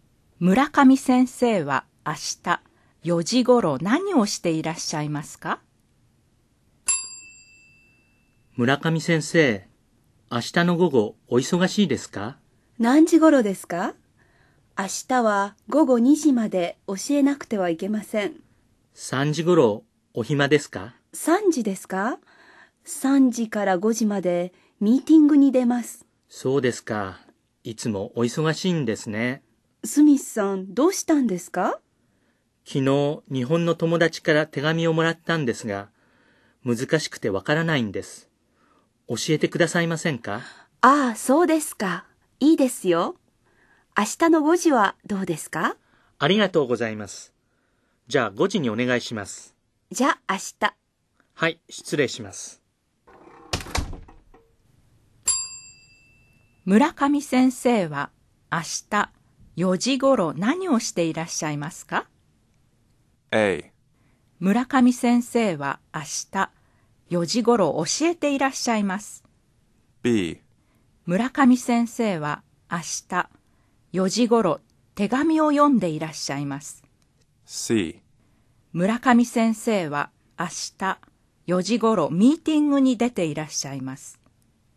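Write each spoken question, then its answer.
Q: 村上先生は明日4時ごろ何をしていらっしゃいますか?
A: C: 村上先生は明日4時ごろミーティングに出ていらっしゃいます。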